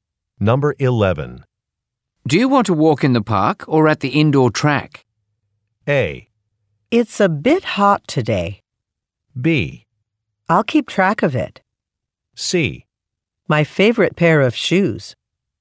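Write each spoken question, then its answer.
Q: Do you want to walk in the park or at the indoor track?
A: A: It's a bit hot today.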